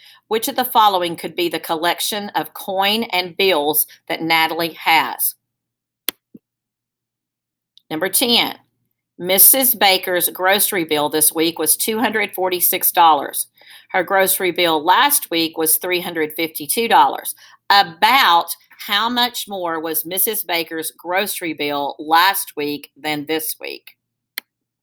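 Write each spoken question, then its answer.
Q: About how much more was Mrs. Baker's grocery bill last week than this week?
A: about $100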